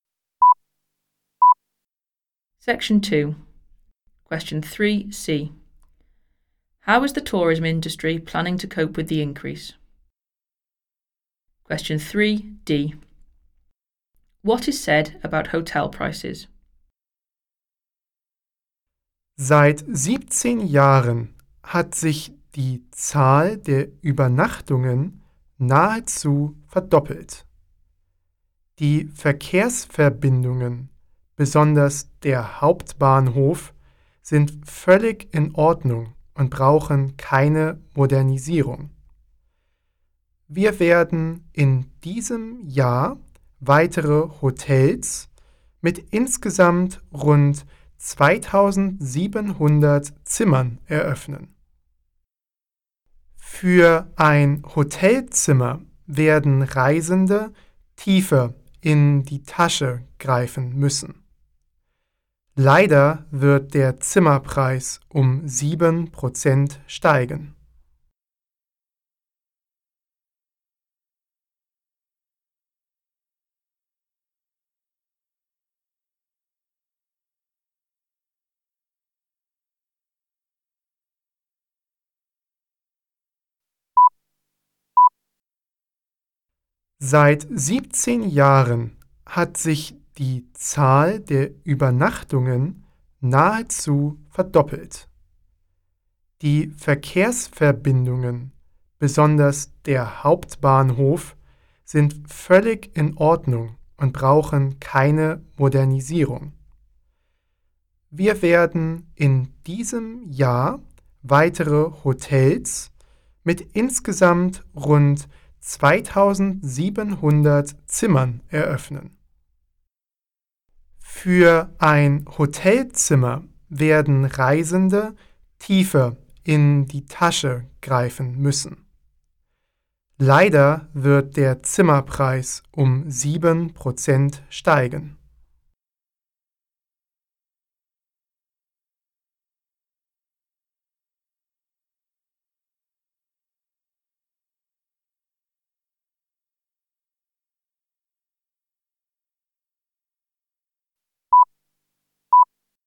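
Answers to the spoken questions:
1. Opening more hotels with about 2,700 rooms this year
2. They will rise by 7%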